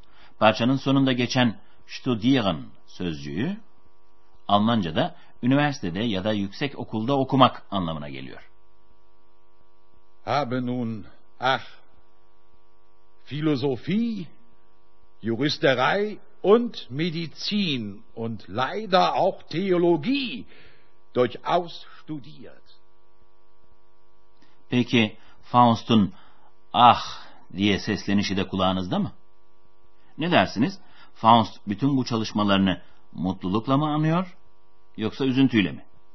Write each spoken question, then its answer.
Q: Faust bütün bu çalışmalarını mutlulukla mı anıyor yoksa üzüntüyle mi?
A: Evet, umutsuzluk ve üzüntüyle.